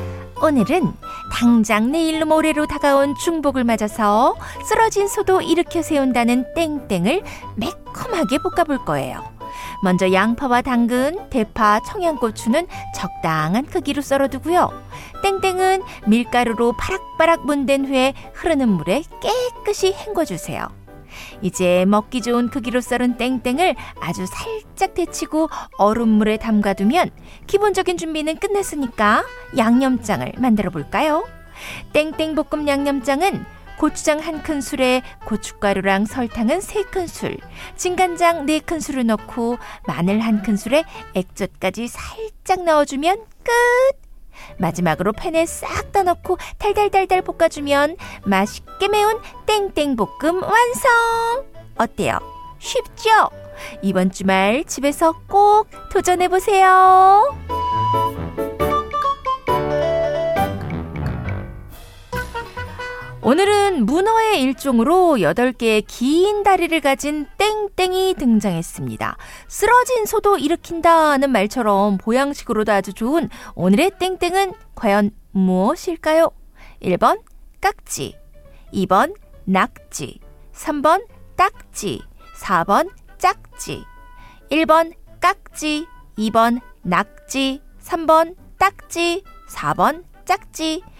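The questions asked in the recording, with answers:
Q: 쓰러진 소도 일으킨다는 말처럼 보양식으로도 아주 좋은 오늘의 땡땡은 과연 무엇일까요?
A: 2: 낙지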